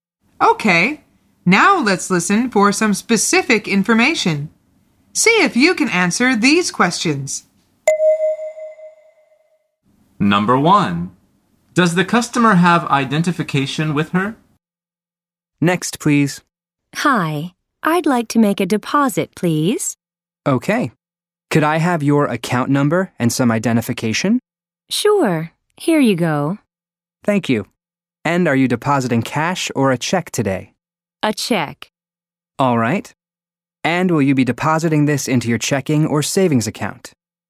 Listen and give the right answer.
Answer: The answer is yes. When the teller asks for it, she says, "Sure, here you go," and gives it to him.